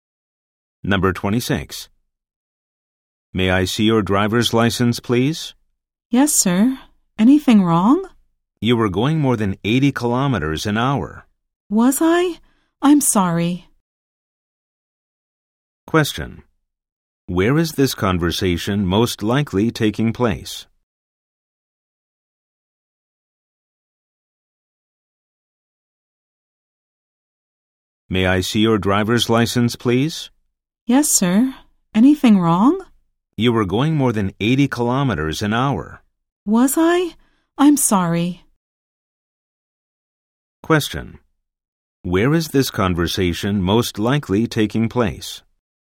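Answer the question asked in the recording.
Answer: On the road (a police officer stopping a driver)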